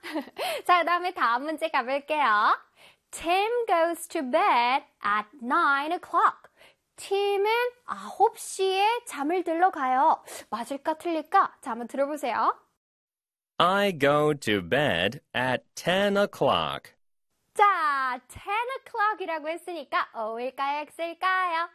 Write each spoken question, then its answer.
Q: Tim goes to bed at 9 o'clock.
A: X가 돼야 되겠지?